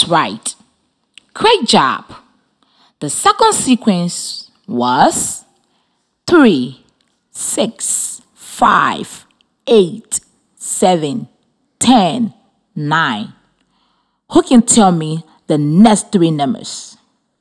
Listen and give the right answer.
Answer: The next three numbers are 12, 11, and 14.